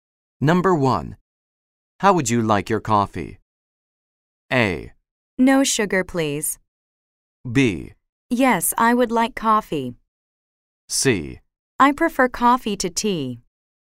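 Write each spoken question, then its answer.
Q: How would you like your coffee?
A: A: No sugar, please.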